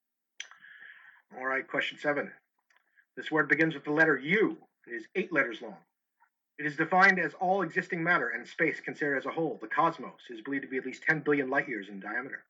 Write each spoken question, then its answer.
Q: This word begins with the letter U.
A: The answer is universe.